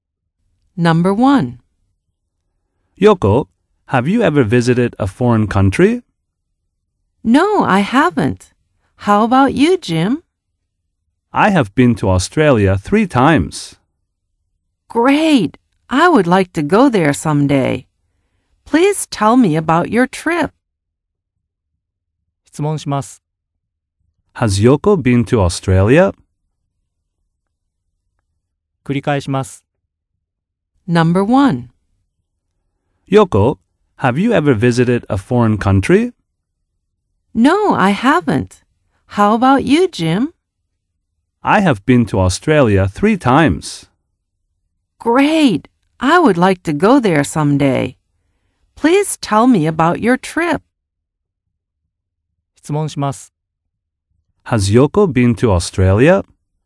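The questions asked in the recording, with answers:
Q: Has Yoko been to Australia?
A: No, she hasn't.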